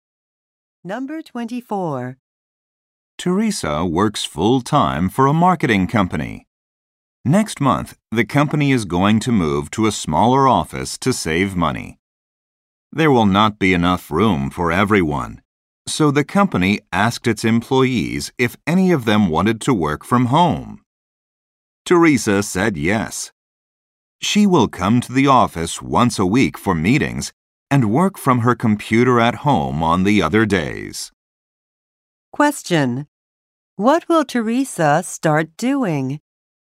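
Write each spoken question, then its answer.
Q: What will Teresa start doing?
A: Working from home most days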